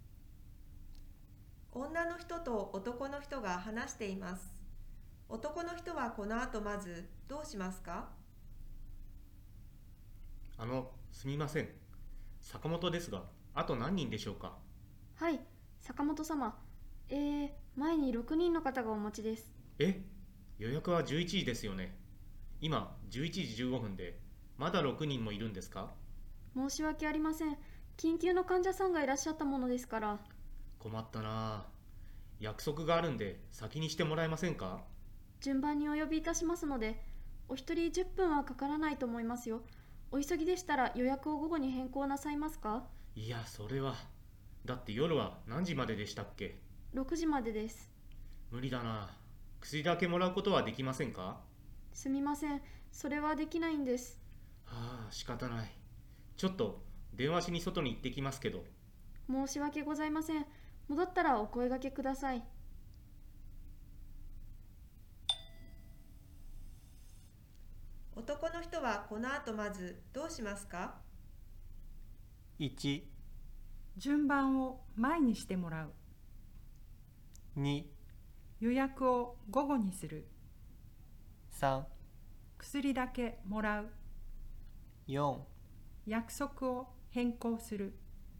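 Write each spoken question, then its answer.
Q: 男の人はこの後まずどうしますか?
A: 4: 約束を変更する。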